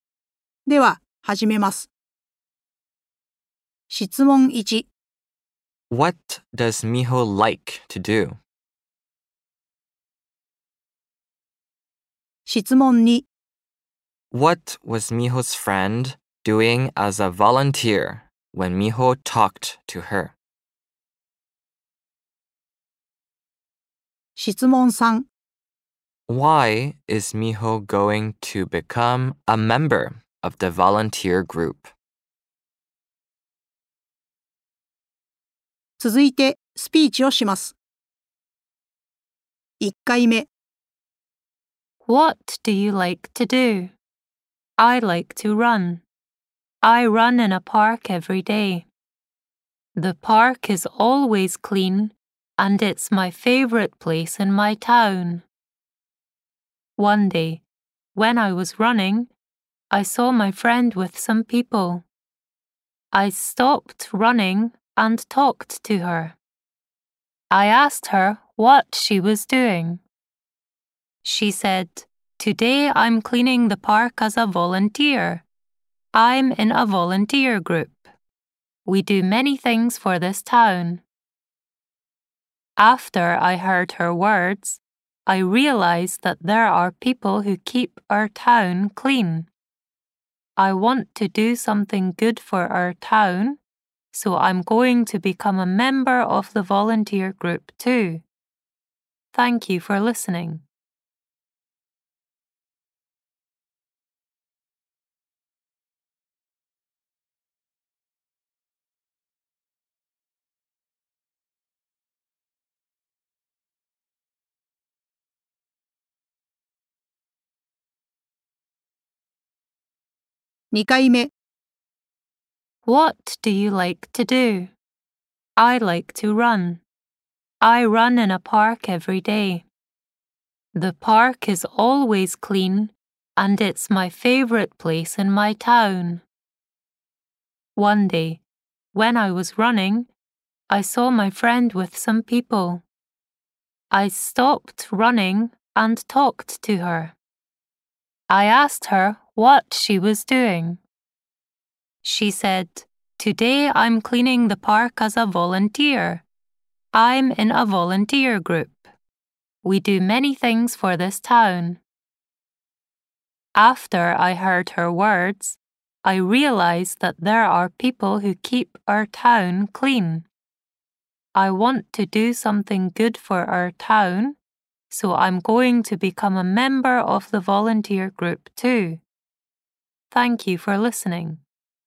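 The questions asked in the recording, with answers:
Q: What does Miho like to do?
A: She likes to run.

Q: What was Miho's friend doing as a volunteer when Miho talked to her?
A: She was cleaning the park.

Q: Why is Miho going to become a member of the volunteer group?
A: Because she wants to do something good for her town.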